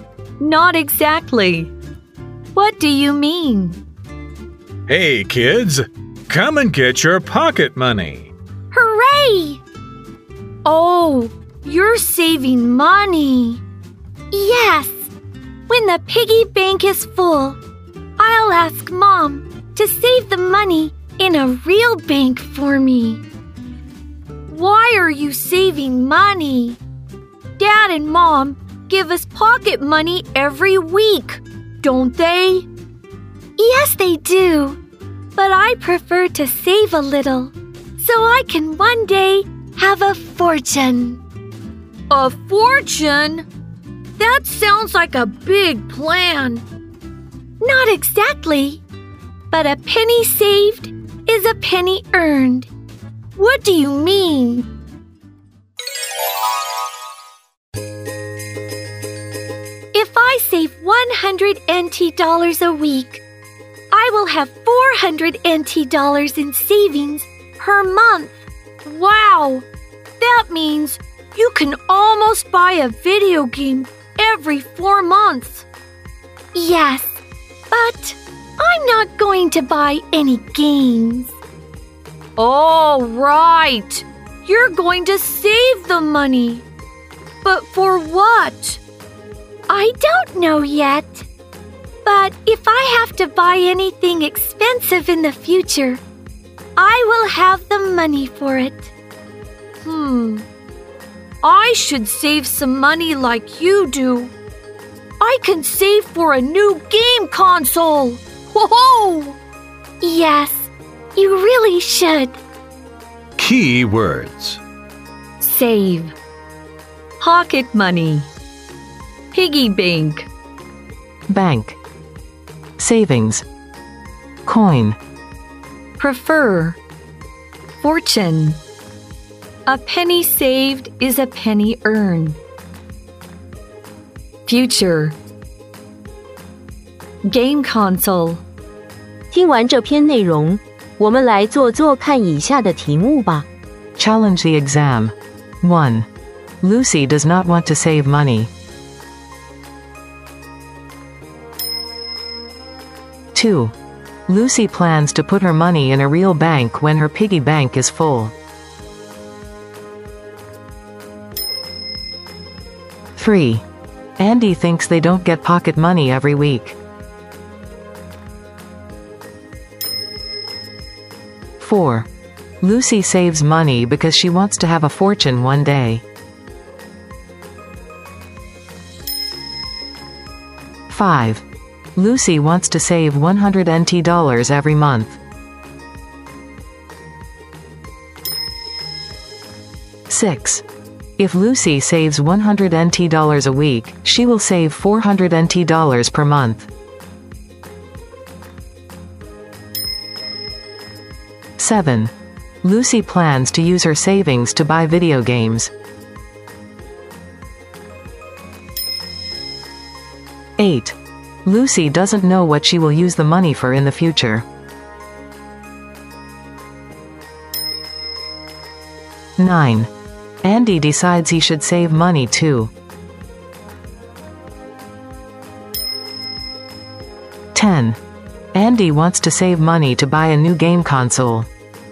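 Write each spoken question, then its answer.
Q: Lucy does not want to save money.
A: False

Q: Lucy plans to put her money in a real bank when her piggy bank is full.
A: True

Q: Andy thinks they don't get pocket money every week.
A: False

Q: Lucy wants to save 100 NT dollars every month.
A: False

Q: If Lucy saves 100 NT dollars a week, she will save 400 NT dollars per month.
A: True

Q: Lucy plans to use her savings to buy video games.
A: False

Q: Lucy doesn't know what she will use the money for in the future.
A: True

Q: Andy decides he should save money too.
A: True

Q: Andy wants to save money to buy a new game console.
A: True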